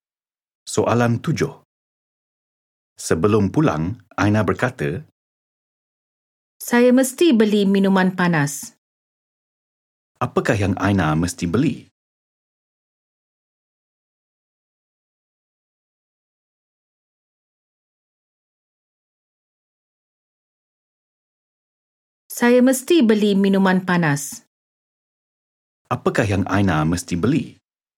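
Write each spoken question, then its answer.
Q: Apakah yang Aina mesti beli?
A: Minuman panas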